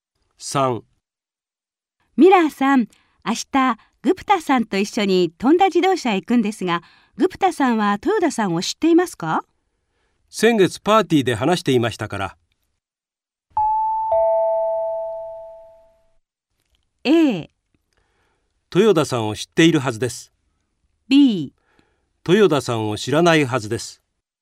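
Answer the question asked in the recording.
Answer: A: 豊田さんを知っているはずです。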